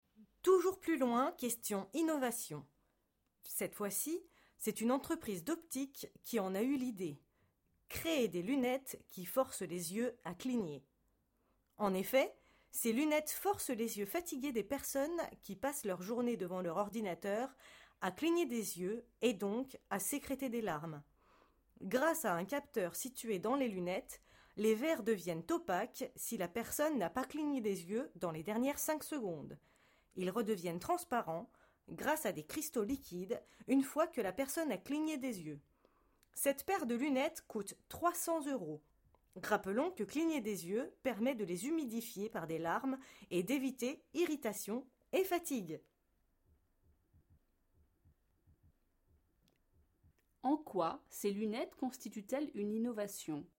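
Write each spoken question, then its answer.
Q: En quoi ces lunettes constituent-elles une innovation?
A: Elles forcent les yeux à cligner : les verres deviennent opaques si la personne n'a pas cligné des yeux depuis 5 secondes.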